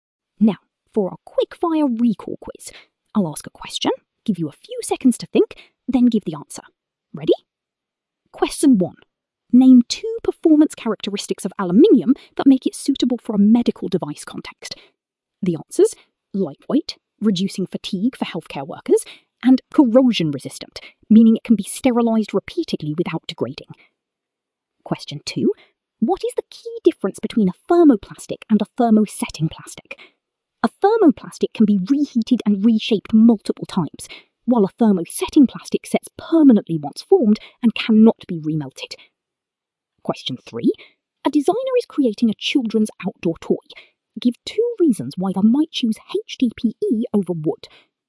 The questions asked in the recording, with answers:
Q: Name two performance characteristics of aluminium that make it suitable for a medical device context.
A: lightweight, reducing fatigue for healthcare workers, and corrosion resistant, meaning it can be sterilised repeatedly without degrading.

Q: What is the key difference between a thermoplastic and a thermosetting plastic?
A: A thermoplastic can be reheated and reshaped multiple times, while a thermosetting plastic sets permanently once formed and cannot be remelted.